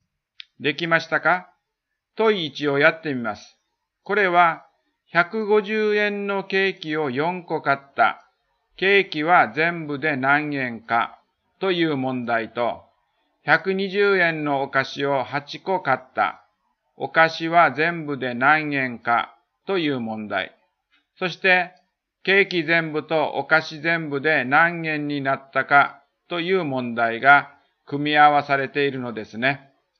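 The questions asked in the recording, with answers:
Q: そして、ケーキ全部とお菓子全部で何円になったかという問題が組み合わされているのですね。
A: 1560円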